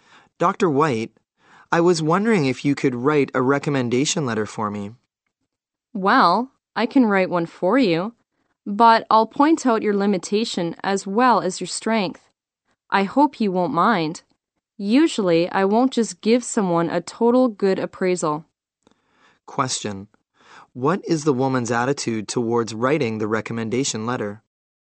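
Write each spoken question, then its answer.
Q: What is the woman's attitude towards writing the recommendation letter?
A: She is willing to write it, but she will be honest about his weaknesses as well as his strengths.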